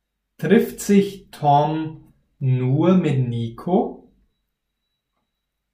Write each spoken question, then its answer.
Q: Trifft sich Tom nur mit Nico?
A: Nein, Tom trifft sich nicht nur mit Nico.